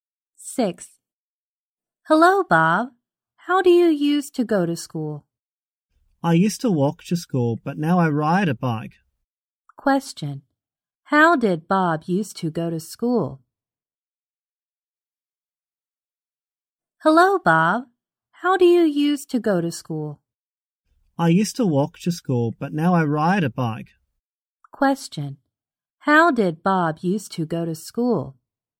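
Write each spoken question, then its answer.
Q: How did Bob used to go to school?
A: He walked to school.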